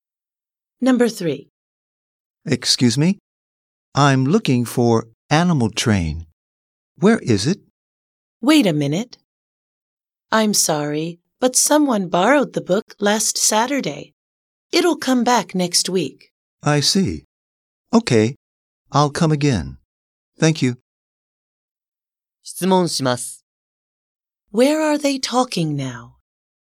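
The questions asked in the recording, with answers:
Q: Where are they talking now?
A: At a library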